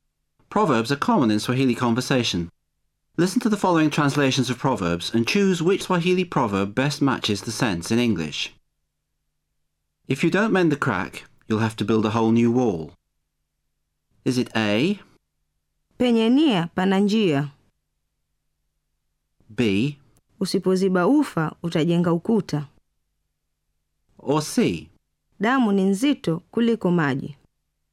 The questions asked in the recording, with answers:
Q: If you don't mend the crack, you'll have to build a whole new wall.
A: The answer is B.